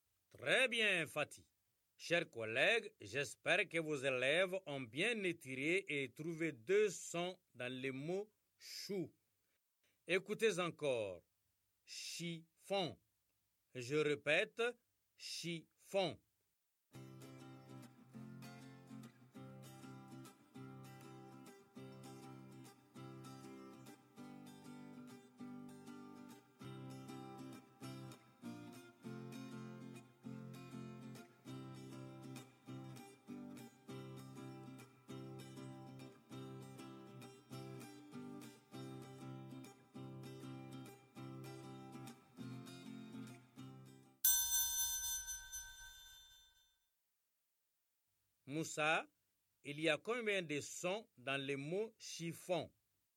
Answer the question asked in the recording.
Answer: F, un, monsieur, 4 sons.